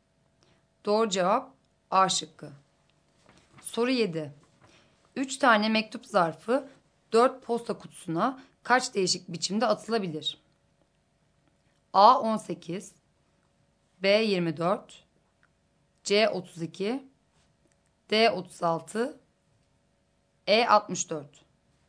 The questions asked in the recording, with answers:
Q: 3 tane mektup zarfı 4 posta kutusuna kaç değişik biçimde atılabilir?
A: Doğru cevap E şıkkı.